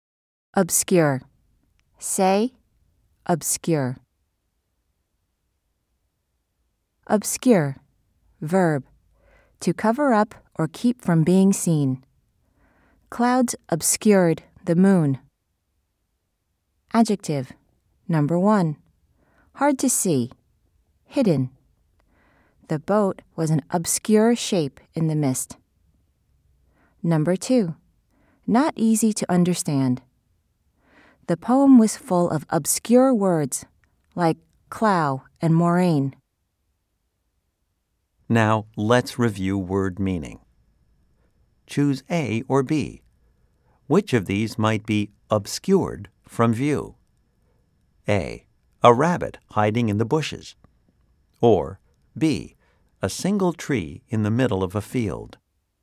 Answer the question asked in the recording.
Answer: If you said A, you are correct.